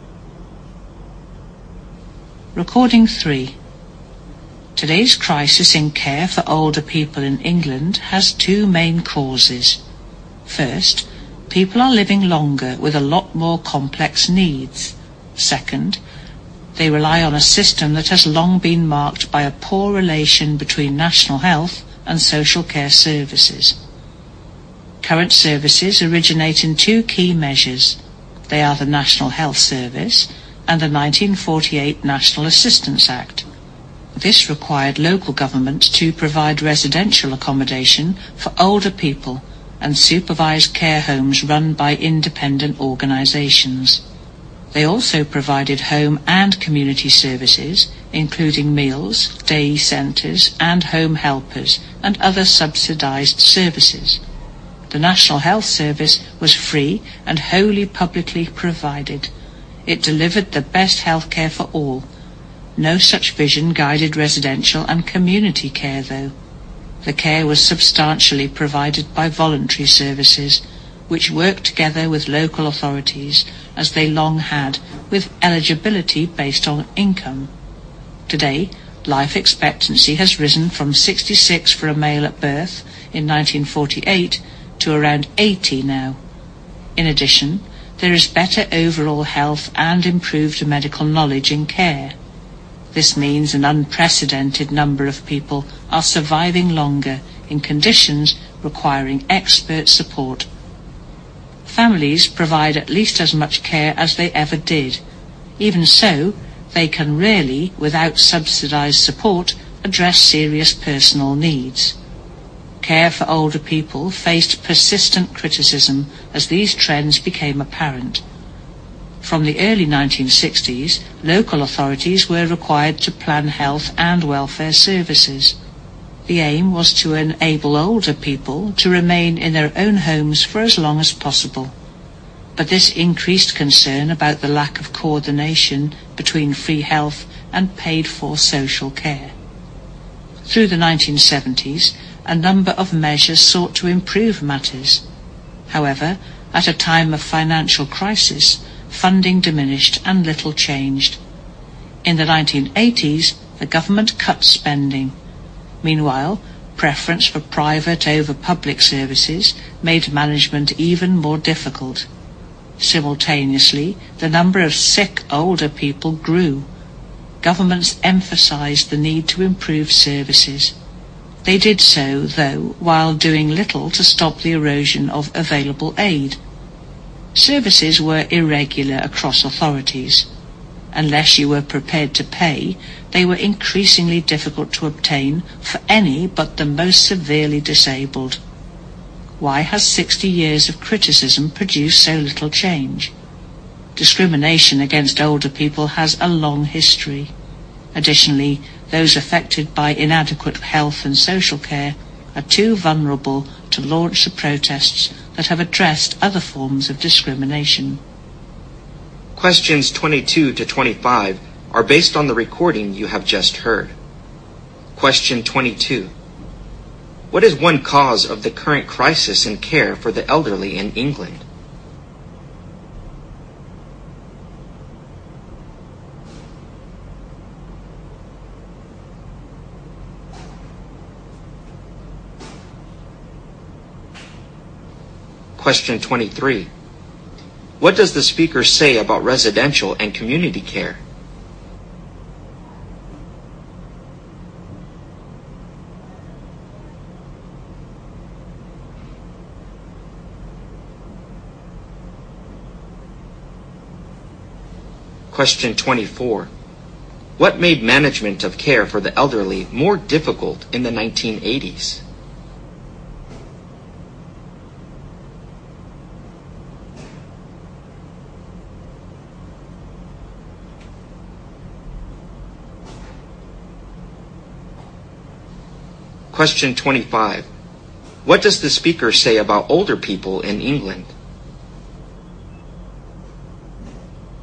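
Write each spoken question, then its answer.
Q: What is one cause of the current crisis in care for the elderly in England?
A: People are living longer with more complex needs

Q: What made management of care for the elderly more difficult in the 1980s?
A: Preference for private over public services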